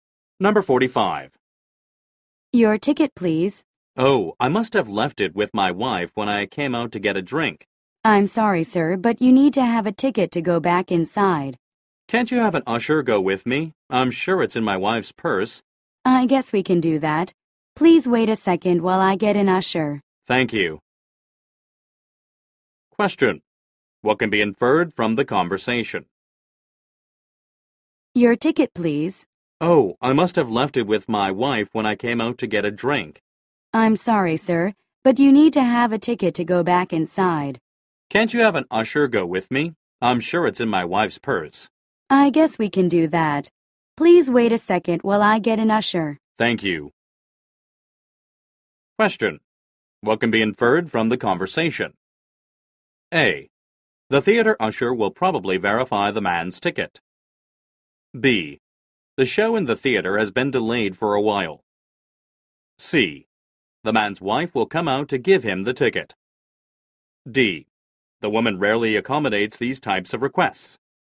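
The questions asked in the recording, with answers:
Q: What can be inferred from the conversation?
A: A: The theater usher will probably verify the man's ticket.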